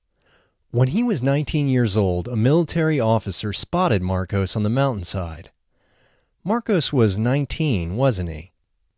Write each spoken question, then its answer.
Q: Marcos was 19, wasn't he?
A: Yes, he was 19.